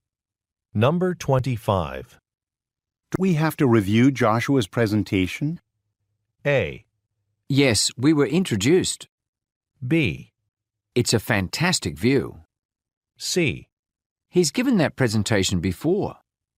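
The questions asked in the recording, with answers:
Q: Do we have to review Joshua's presentation?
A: C: He's given that presentation before.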